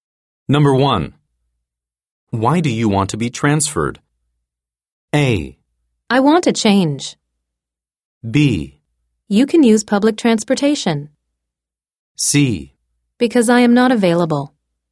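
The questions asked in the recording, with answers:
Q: Why do you want to be transferred?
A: A: I want a change.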